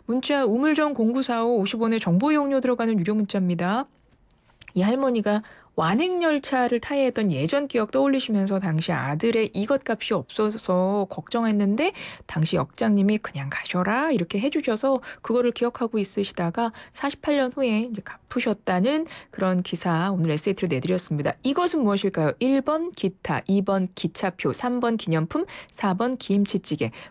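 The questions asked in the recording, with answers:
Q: 이것은 무엇일까요? 1번 기타, 2번 기차표, 3번 기념품, 4번 김치찌개.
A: 2: 기차표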